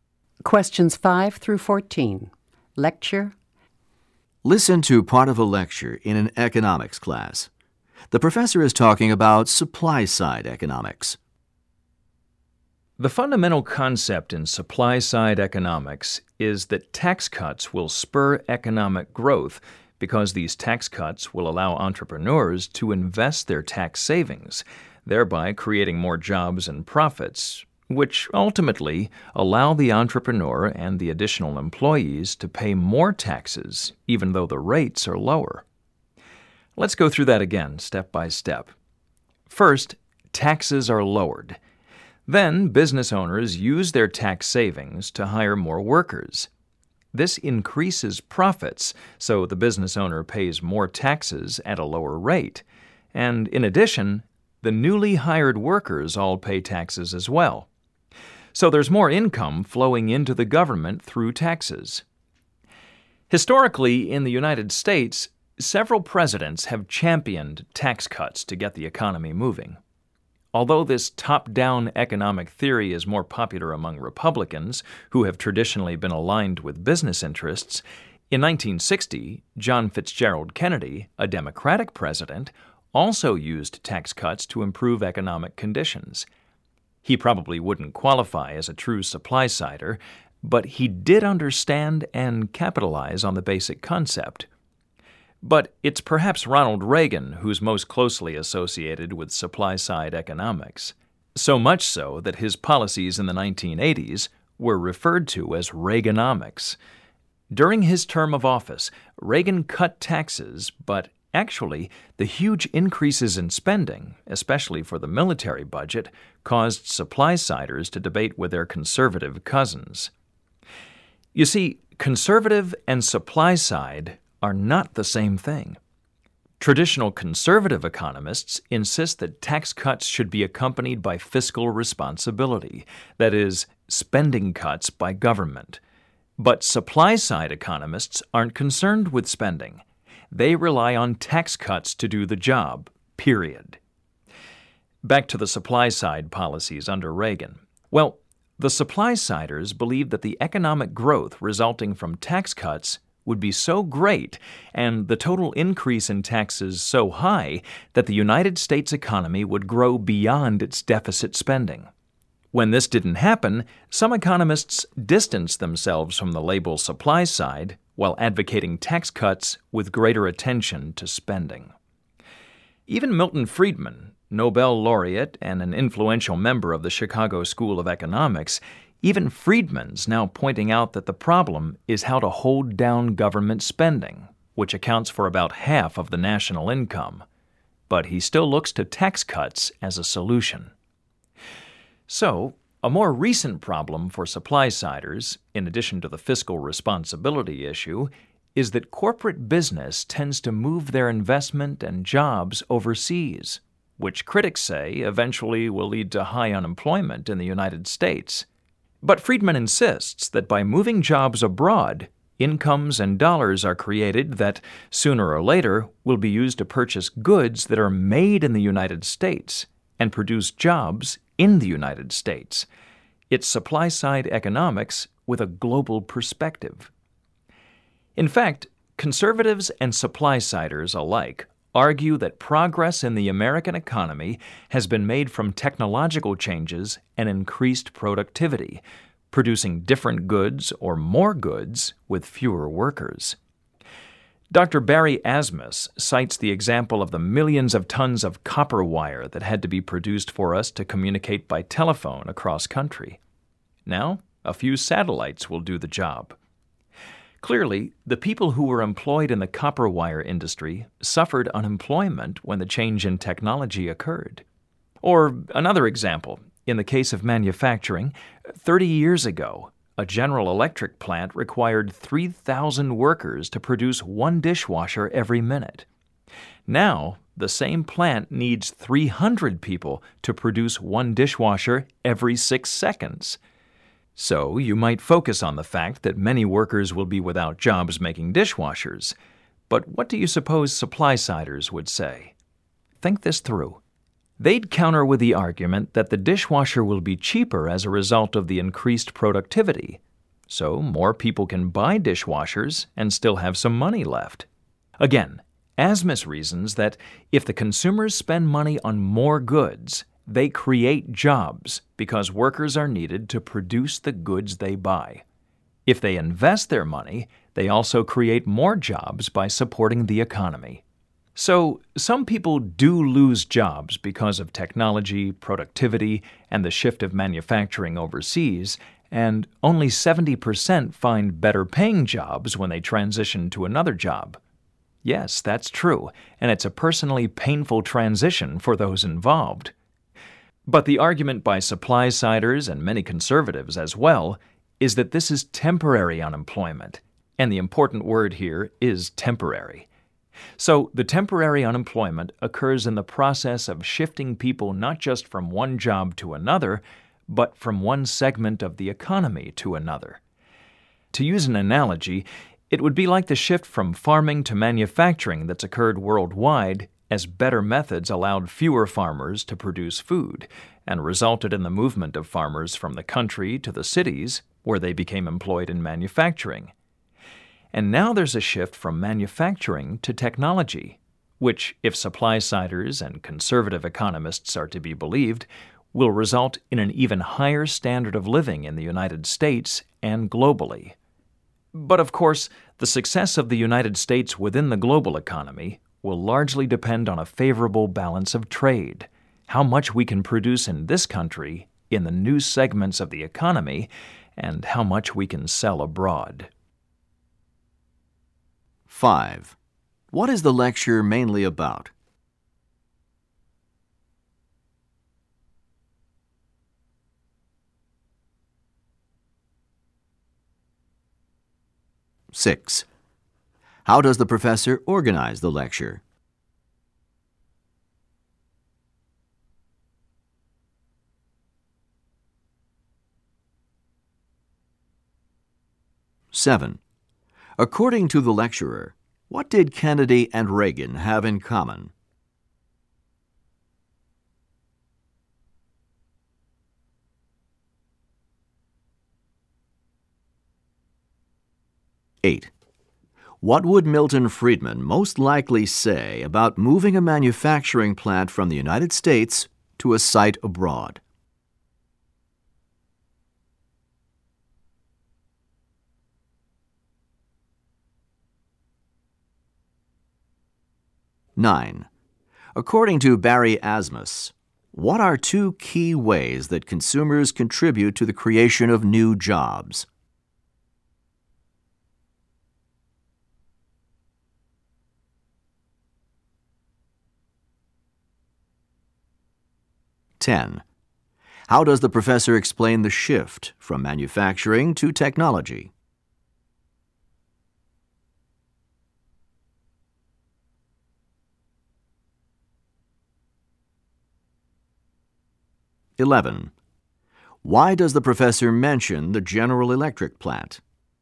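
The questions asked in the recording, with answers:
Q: What is the lecture mainly about?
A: Supply-side economics

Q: According to the lecturer, what did Kennedy and Reagan have in common?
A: Both used tax cuts to improve the economy

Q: What would Milton Friedman most likely say about moving a manufacturing plant from the United States to a site abroad?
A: It creates incomes abroad that will eventually buy US goods and create US jobs

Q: According to Barry Asmus, what are two key ways that consumers contribute to the creation of new jobs?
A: By spending money on more goods and by investing their money

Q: How does the professor explain the shift from manufacturing to technology?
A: By comparing it to the earlier shift from farming to manufacturing

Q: Why does the professor mention the General Electric plant?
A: As an example of technology increasing productivity with fewer workers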